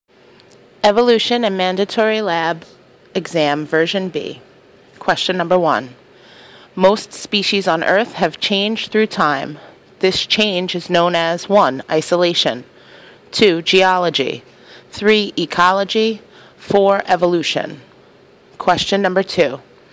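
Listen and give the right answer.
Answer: 4: Evolution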